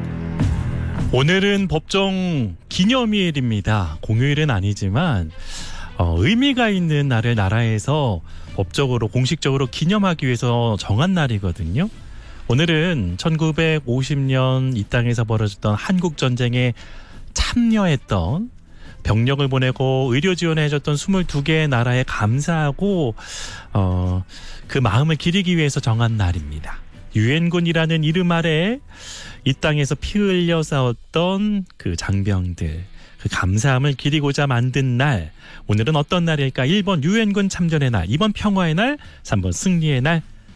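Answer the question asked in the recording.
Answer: 1번: 유엔군 참전의 날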